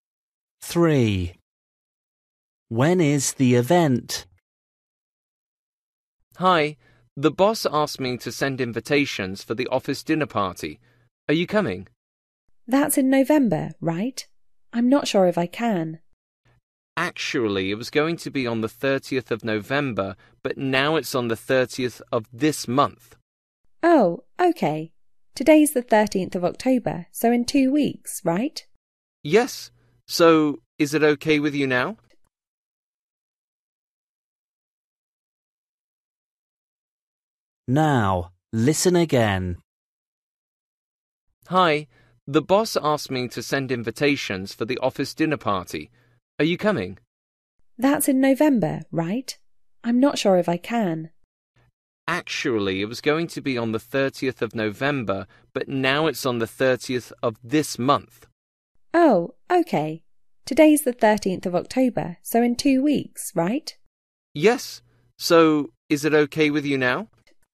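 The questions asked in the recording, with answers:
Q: When is the event?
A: 30th October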